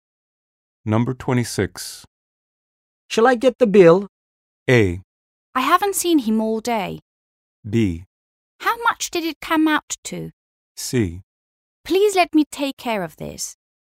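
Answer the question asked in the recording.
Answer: C: Please let me take care of this.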